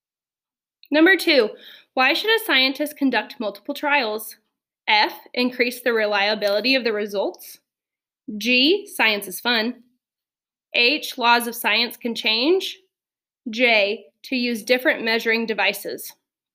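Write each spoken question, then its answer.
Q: Why should a scientist conduct multiple trials?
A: F: increase the reliability of the results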